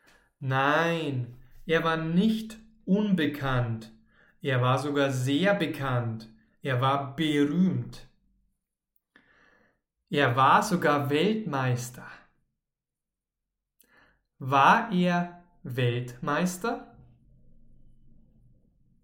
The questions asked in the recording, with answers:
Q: War er Weltmeister?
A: Ja, er war sogar Weltmeister.